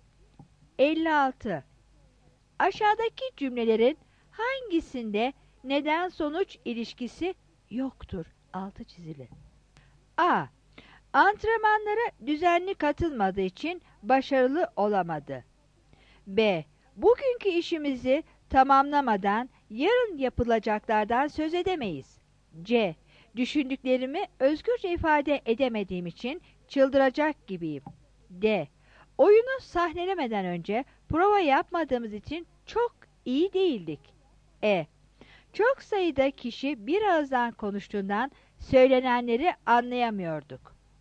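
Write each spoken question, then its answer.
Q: Aşağıdaki cümlelerin hangisinde neden sonuç ilişkisi yoktur?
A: B: Bugünkü işimizi tamamlamadan yarın yapılacaklardan söz edemeyiz.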